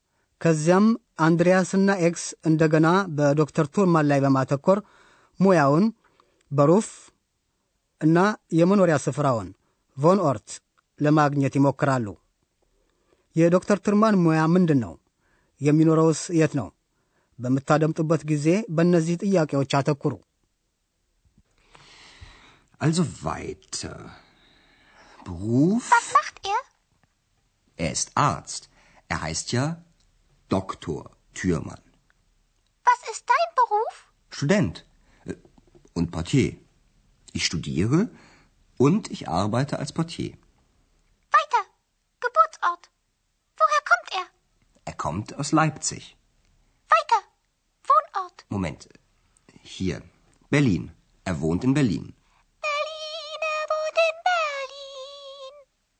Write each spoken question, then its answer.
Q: የዶክተር ትርማን ሙያ ምንድን ነው?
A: ዶክተር ቱርማን በሙያው ሐኪም ነው።

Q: የሚኖረውስ የት ነው?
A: ዶክተር ቱርማን የሚኖረው በርሊን ውስጥ ነው።